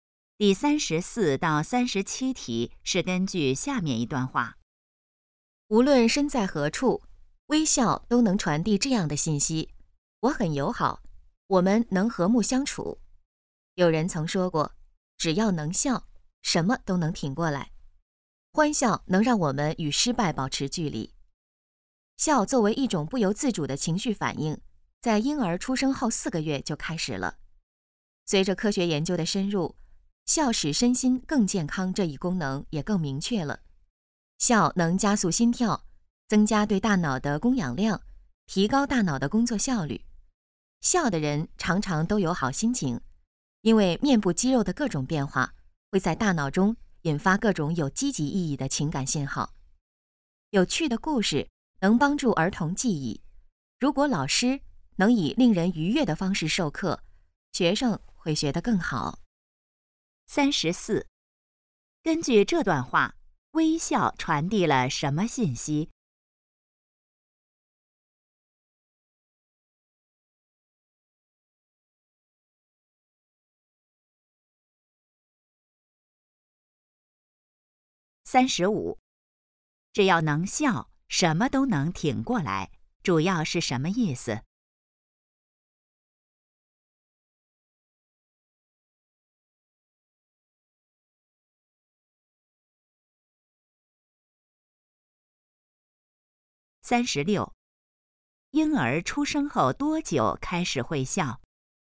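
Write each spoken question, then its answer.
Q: 根据这段话,微笑传递了什么信息?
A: 我很友好,我们能和睦相处

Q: 婴儿出生后多久开始会笑?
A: 4个月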